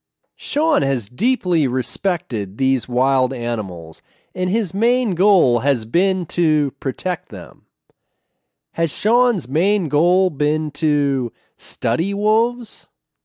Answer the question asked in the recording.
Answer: No, his main goal hasn't been to study wolves.